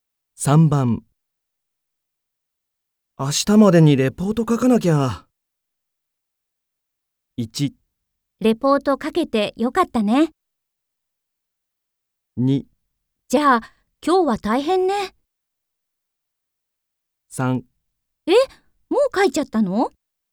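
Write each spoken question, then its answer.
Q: 明日までにレポート書かなきゃ。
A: 2: じゃあ今日は大変ね。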